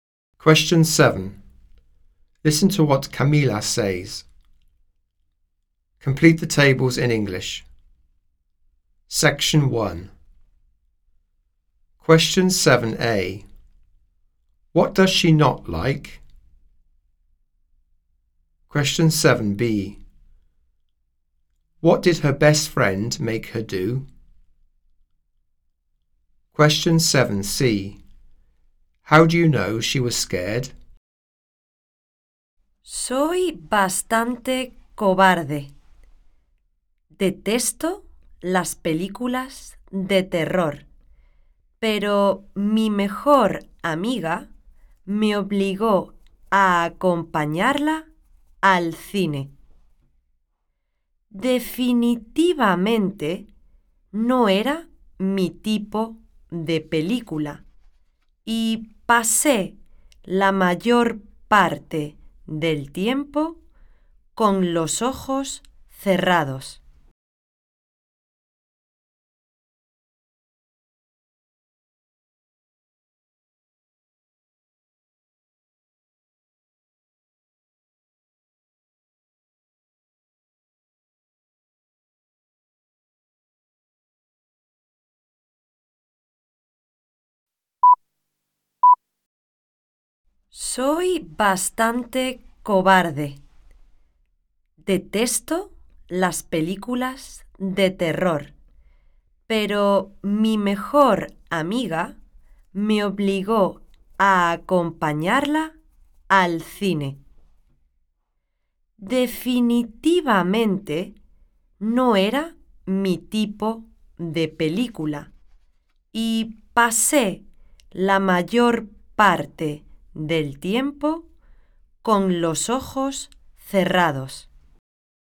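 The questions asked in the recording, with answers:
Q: What does she not like?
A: Horror films

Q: What did her best friend make her do?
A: Go with her to the cinema

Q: How do you know she was scared?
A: She had her eyes closed most of the time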